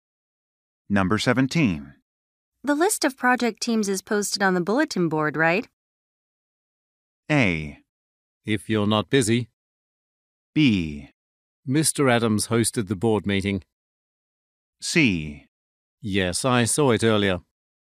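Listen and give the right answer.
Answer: C: Yes, I saw it earlier.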